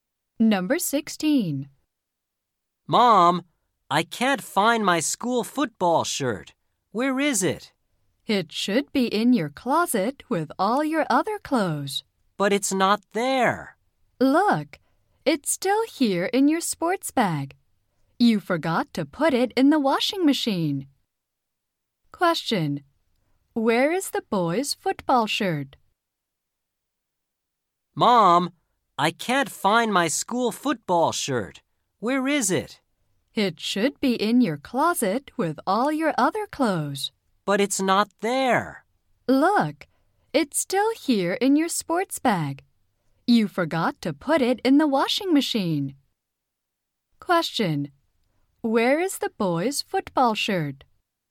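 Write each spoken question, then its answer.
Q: Where is the boy's football shirt?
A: In his sports bag.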